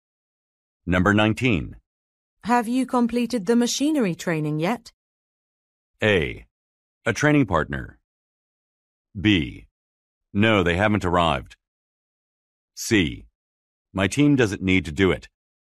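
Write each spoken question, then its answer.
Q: Have you completed the machinery training yet?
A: C: My team doesn't need to do it.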